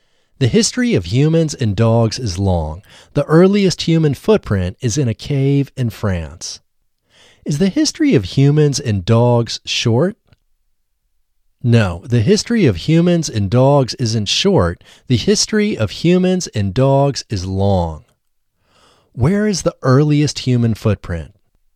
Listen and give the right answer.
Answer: The earliest human footprint is in a cave in France.